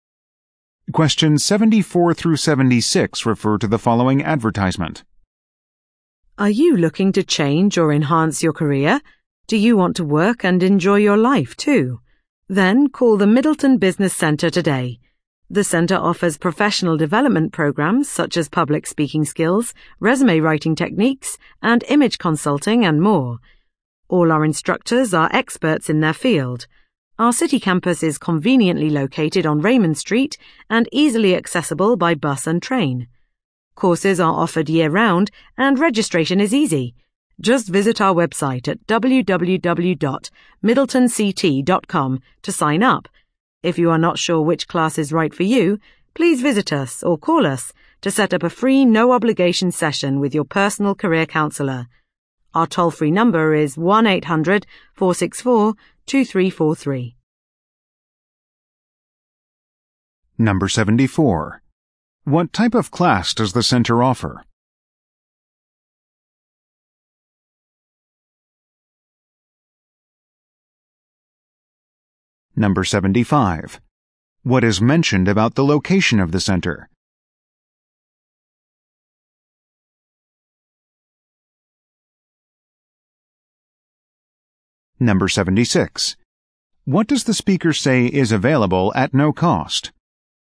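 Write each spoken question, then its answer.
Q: What type of class does the centre offer?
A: Professional development

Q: What is mentioned about the location of the center?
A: Easily accessible by bus and train

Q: What does the speaker say is available at no cost?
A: A session with a personal career counsellor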